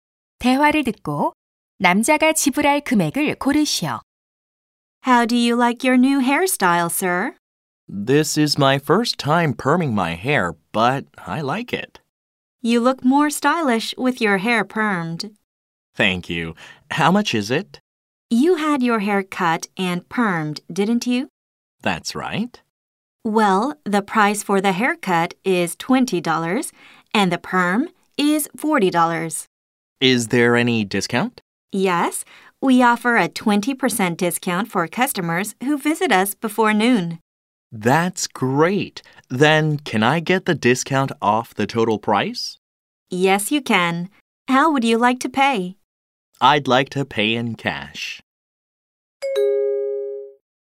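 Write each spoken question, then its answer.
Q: 대화를 듣고 남자가 지불할 금액을 고르시오.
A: 48달러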